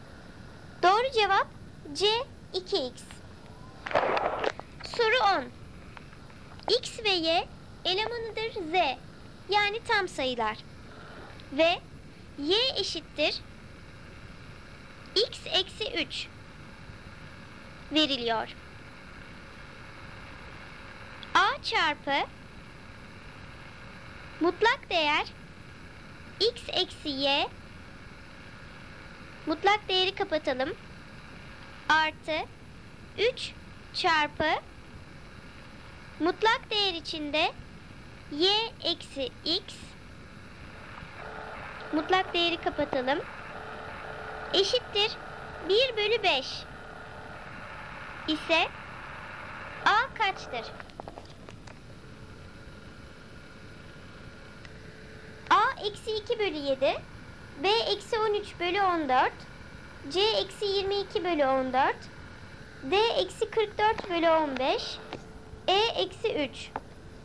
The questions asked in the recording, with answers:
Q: Artı 3 çarpı mutlak değer içinde y eksi x mutlak değeri kapatalım eşittir 1 bölü 5 ise a kaçtır?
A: doğru cevap D eksi 44 bölü 15